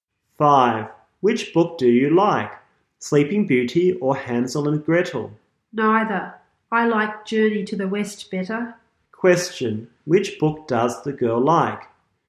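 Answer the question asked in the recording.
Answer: Journey to the West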